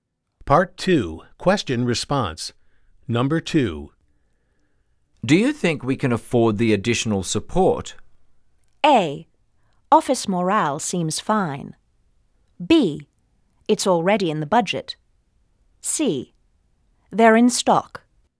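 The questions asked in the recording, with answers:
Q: Do you think we can afford the additional support?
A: B: It's already in the budget.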